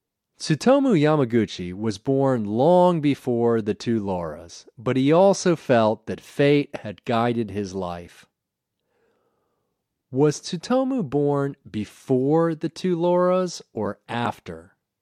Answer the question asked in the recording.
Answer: Tsutomu was born long before the two Lauras.